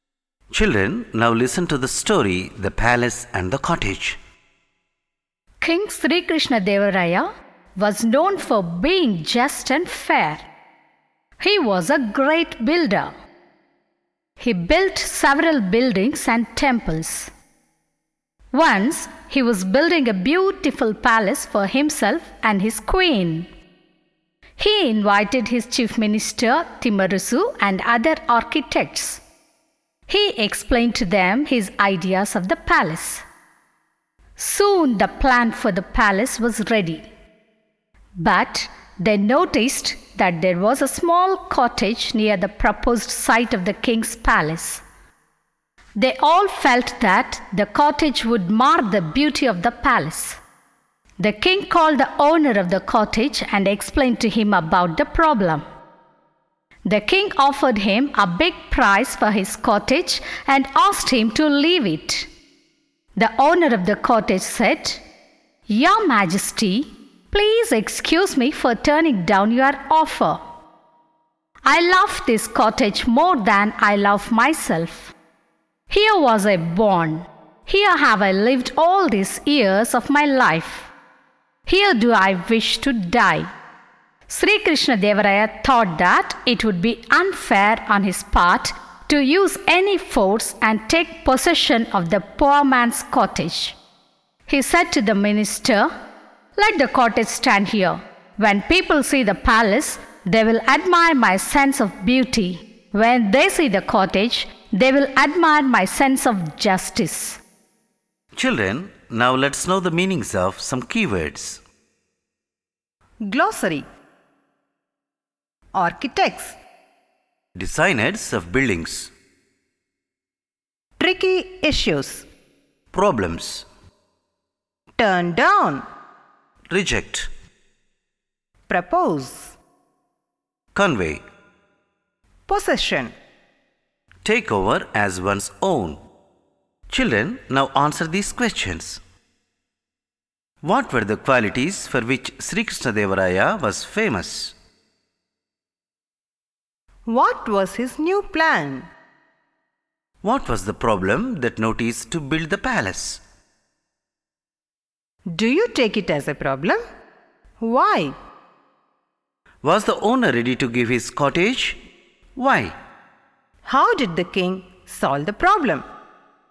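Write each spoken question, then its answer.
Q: What were the qualities for which Sri Krishna Devaraya was famous?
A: Being just and fair

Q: What was his new plan?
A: To build a beautiful palace for himself and his queen

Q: What was the problem that noticed to build the palace?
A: A small cottage near the palace site would spoil its beauty

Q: Was the owner ready to give his cottage?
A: No

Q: How did the king solve the problem?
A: He let the cottage stand near the palace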